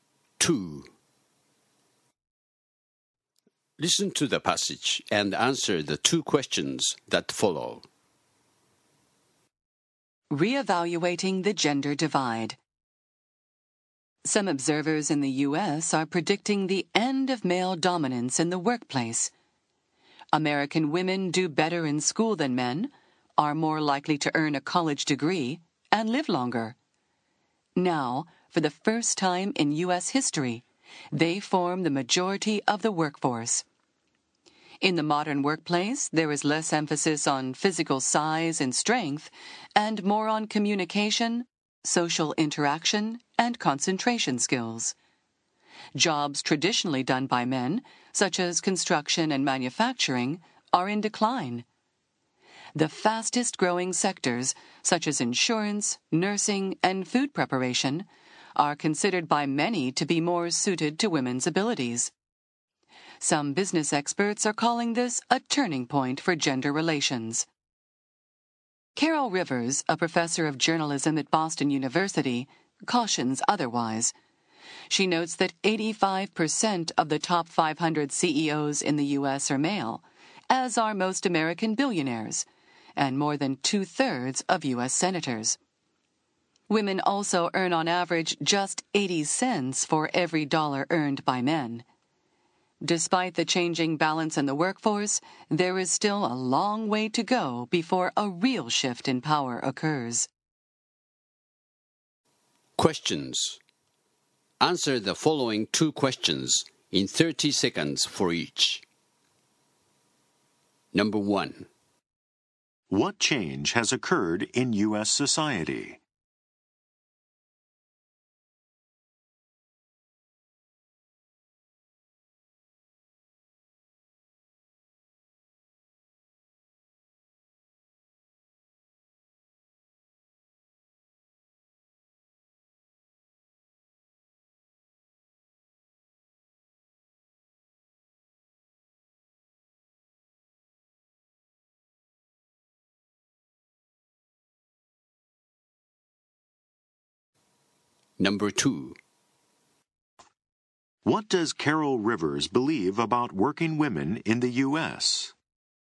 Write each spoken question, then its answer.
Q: What does Caryl Rivers believe about working women in the U.S.?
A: While women are in the majority, the best positions still go largely to men.